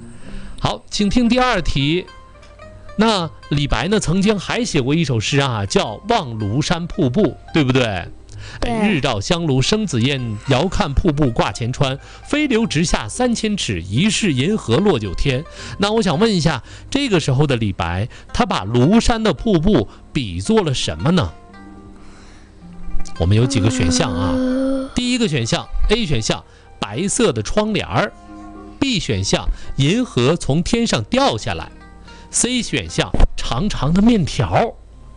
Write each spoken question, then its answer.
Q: 那我想问一下,这个时候的李白他把庐山的瀑布比作了什么呢?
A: 银河从天上掉下来。